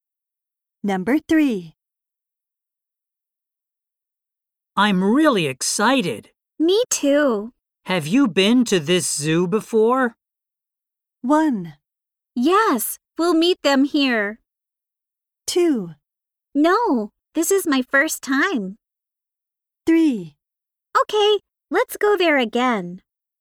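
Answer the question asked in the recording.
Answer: 2: No, this is my first time.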